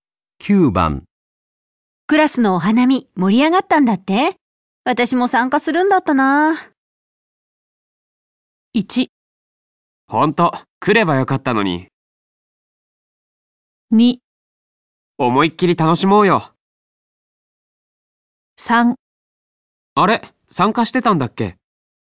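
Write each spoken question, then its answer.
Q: クラスのお花見盛り上がったんだって私も参加するんだったな。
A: 1: ほんと、来ればよかったのに。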